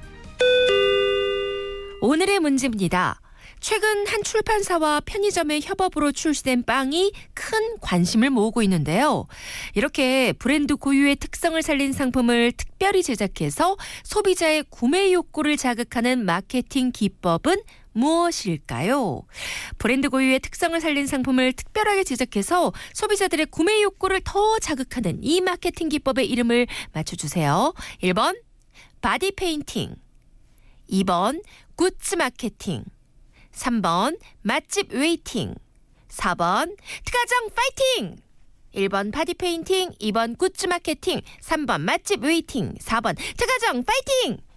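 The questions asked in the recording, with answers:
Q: 브랜드 고유의 특성을 살린 상품을 특별하게 제작해서 소비자들의 구매 욕구를 더 자극하는 이 마케팅 기법의 이름을 맞춰주세요.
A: 2: 굿즈 마케팅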